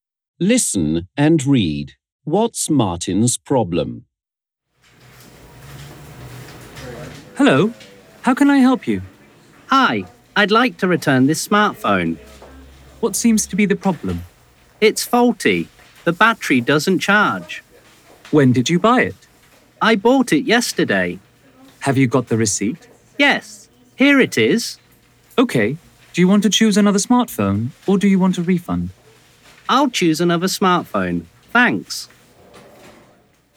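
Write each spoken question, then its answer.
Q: What's Martin's problem?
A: His new smartphone is faulty: the battery doesn't charge.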